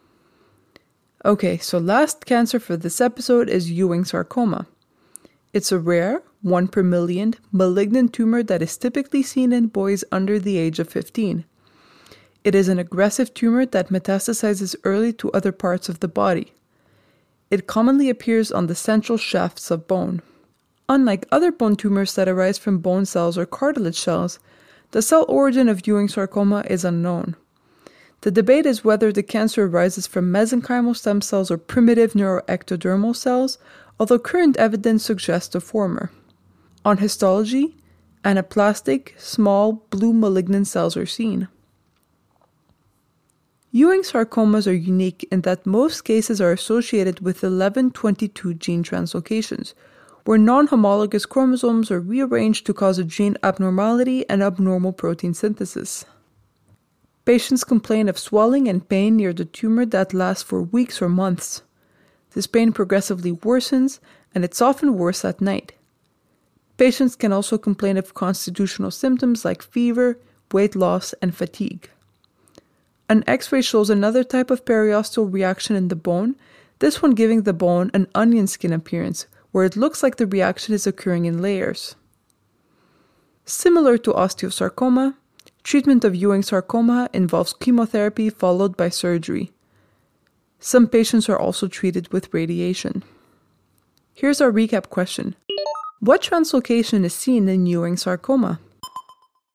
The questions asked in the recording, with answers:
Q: What translocation is seen in Ewing sarcoma?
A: Ewing sarcomas are associated with the 11-22 translocation.